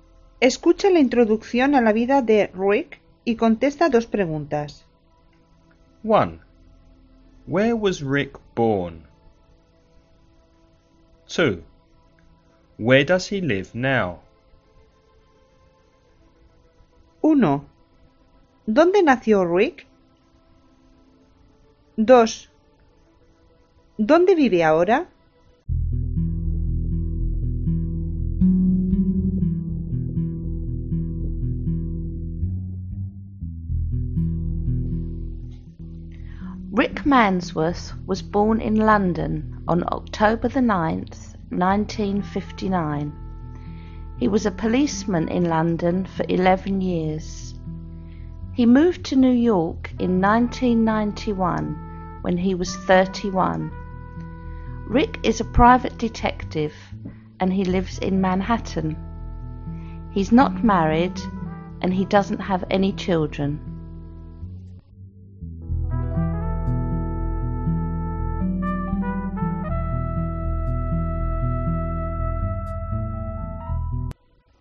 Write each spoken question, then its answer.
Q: Where was Rick born?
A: He was born in London.

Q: Where does he live now?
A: He lives in Manhattan, New York.